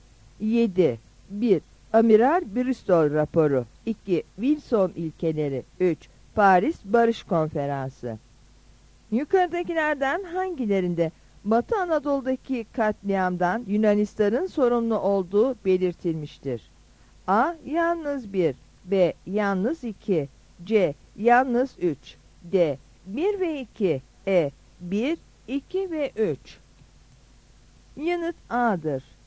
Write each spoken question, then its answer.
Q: Yukarıdakilerden hangilerinde Batı Anadolu'daki katliamdan Yunanistan'ın sorumlu olduğu belirtilmiştir?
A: Yanıt A'dır.